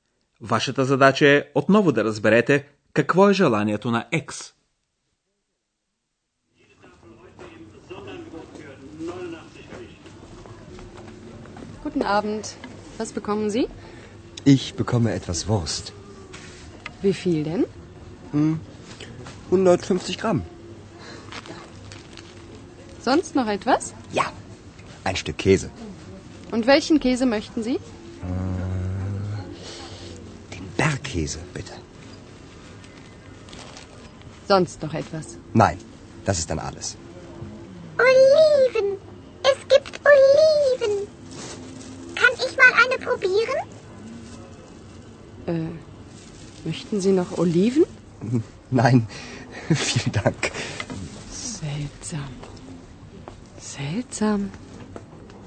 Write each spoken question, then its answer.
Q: Вашата задача е отново да разберете какво е желанието на X.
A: Екс видя при продавачката маслини, на немски оливен, и иска да опита една.